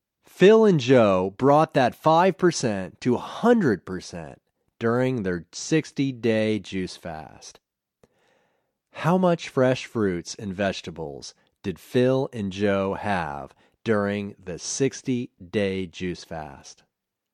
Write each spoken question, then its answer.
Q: How much fresh fruits and vegetables did Phil and Joe have during the 60-day juice fast?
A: They had 100% fresh fruits and vegetables during the 60-day juice fast.